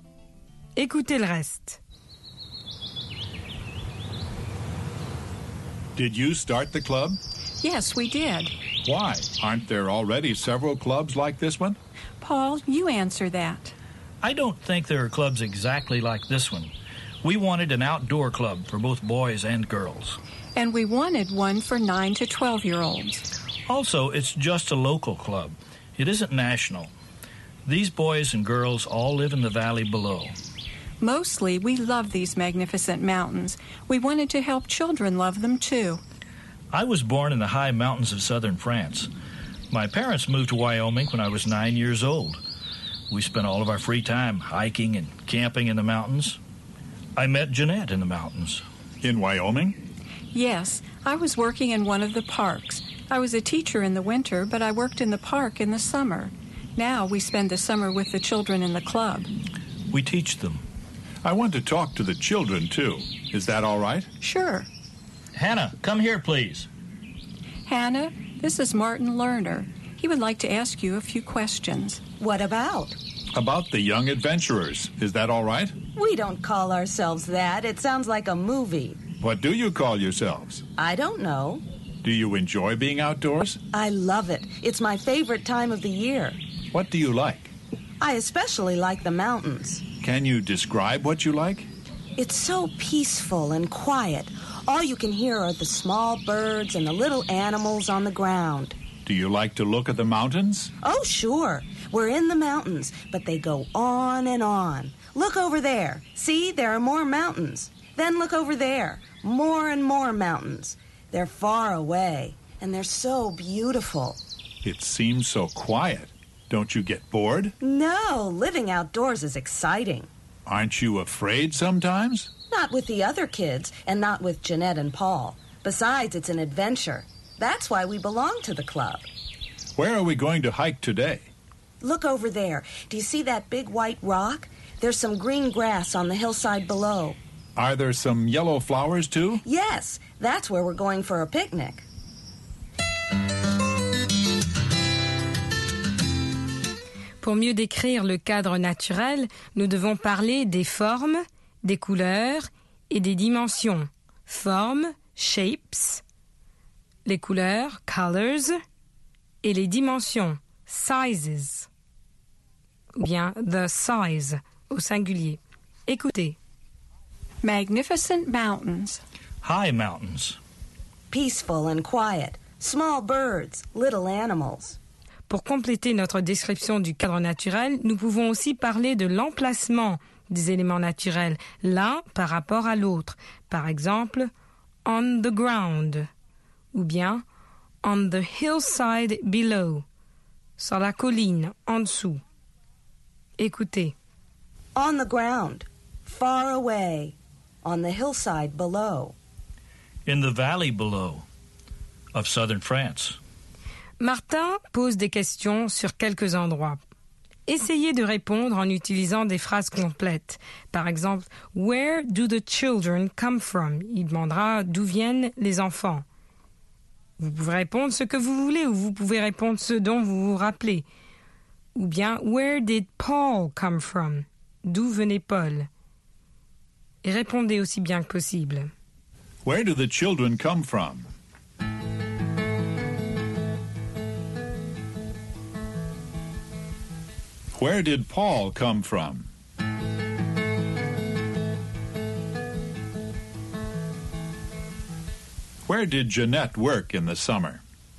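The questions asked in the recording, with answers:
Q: « Where do the children come from ?»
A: From the valley below

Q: Where did Paul come from?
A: From the high mountains of southern France

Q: Where did Jeanette work in the summer?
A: In one of the parks in Wyoming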